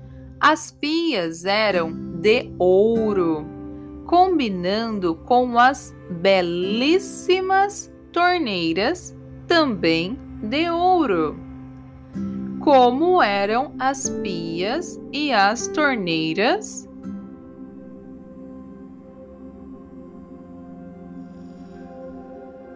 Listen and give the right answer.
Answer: eram de ouro, combinando com as belíssimas torneiras, também de ouro.